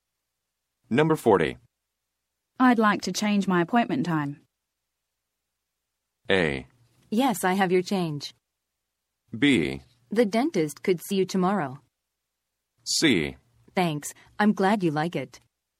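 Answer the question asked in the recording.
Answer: B: The dentist could see you tomorrow.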